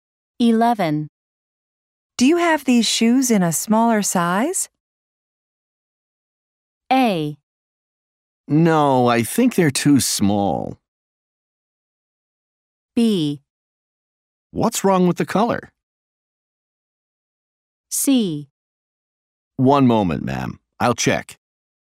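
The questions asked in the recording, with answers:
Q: Do you have these shoes in a smaller size?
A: C: One moment, ma'am. I'll check.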